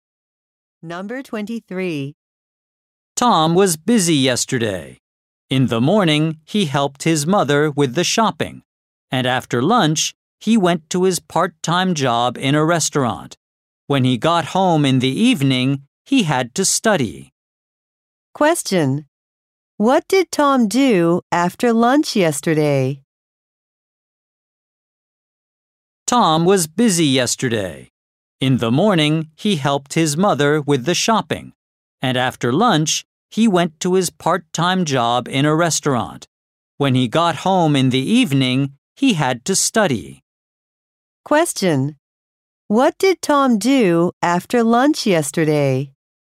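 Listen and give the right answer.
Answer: He went to his part-time job in a restaurant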